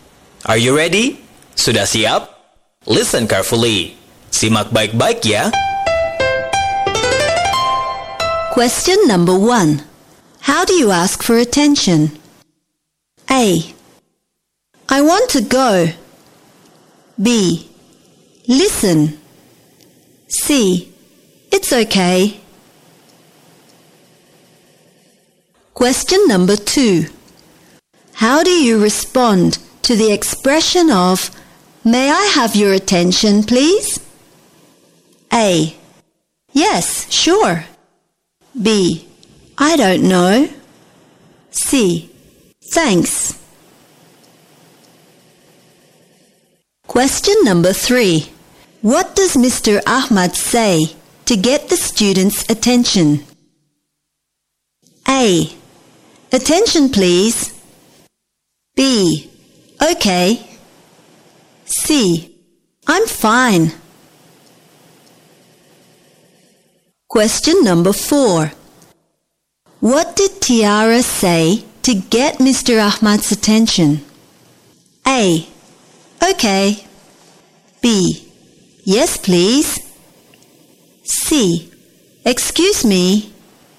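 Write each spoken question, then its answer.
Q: How do you ask for attention?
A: Sahabat cerdas, jawaban yang benar untuk pertanyaan nomor 1 adalah B.

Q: How do you respond to the expression of May I have your attention, please?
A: A: Yes, sure.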